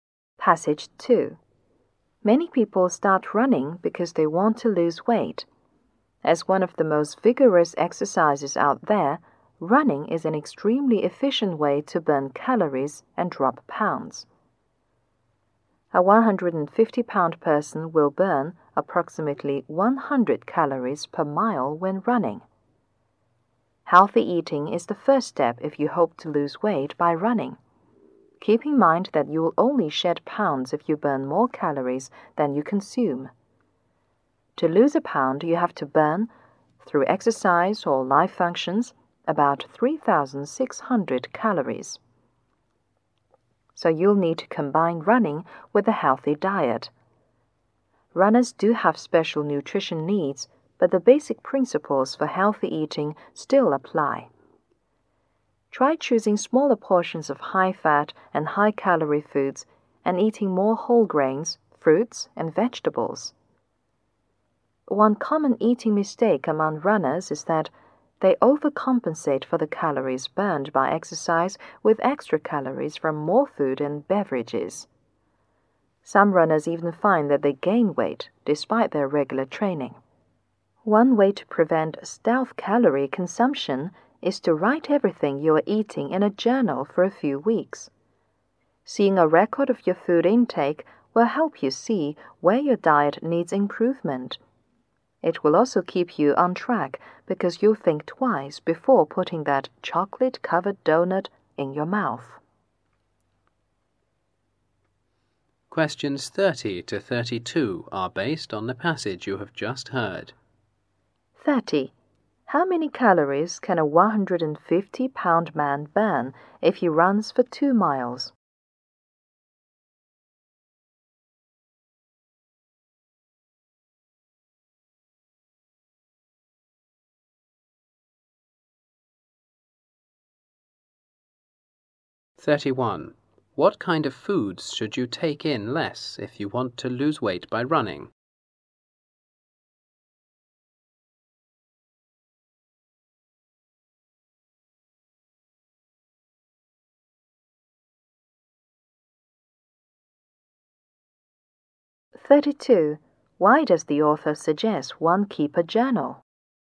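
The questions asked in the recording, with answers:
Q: How many calories can a 150-pound man burn if he runs for 2 miles?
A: About 200 calories

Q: What kind of foods should you take in less if you want to lose weight by running?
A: High-fat and high-calorie foods

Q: Why does the author suggest one keep a journal?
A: To see where the diet needs improvement and to stay on track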